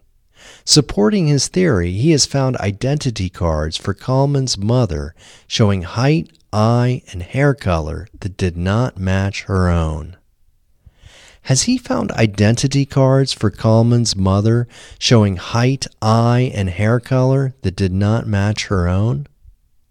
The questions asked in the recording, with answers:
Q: Has he found identity cards for Kalman's mother showing height, eye, and hair color that did not match her own?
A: Yes, he has found identity cards for Kalman's mother showing height, eye, and hair color that did not match her own.